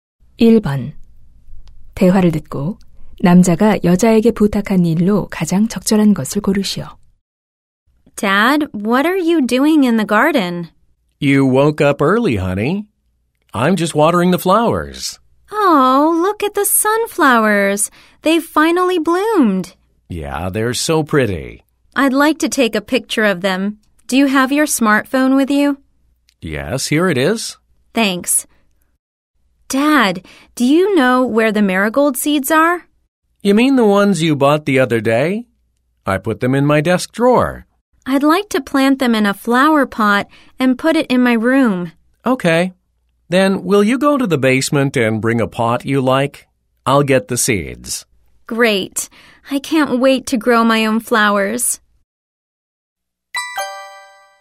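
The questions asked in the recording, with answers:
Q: 대화를 듣고 남자가 여자에게 부탁한 일로 가장 적절한 것을 고르시오.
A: 지하실에서 화분 가져오기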